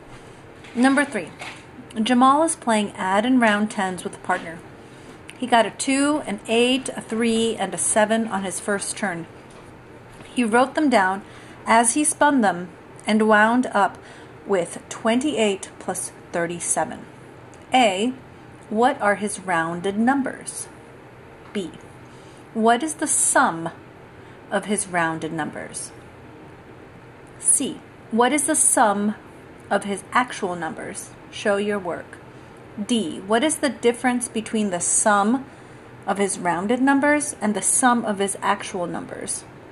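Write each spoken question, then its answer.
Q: What are his rounded numbers?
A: 30 and 40

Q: What is the sum of his rounded numbers?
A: 70

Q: What is the sum of his actual numbers?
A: 65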